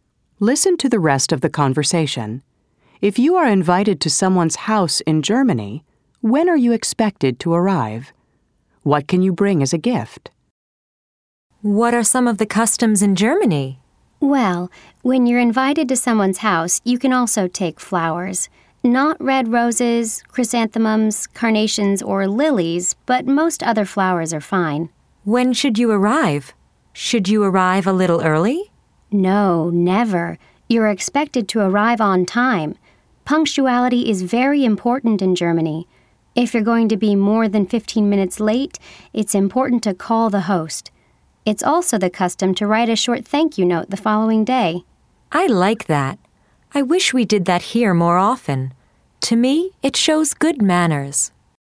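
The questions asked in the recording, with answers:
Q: If you are invited to someone's house in Germany, when are you expected to arrive?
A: On time (never early)

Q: What can you bring as a gift?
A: Flowers (but not red roses, chrysanthemums, carnations or lilies)

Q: What are some of the customs in Germany?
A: Being on time; calling the host if you'll be more than 15 minutes late; writing a short thank-you note the next day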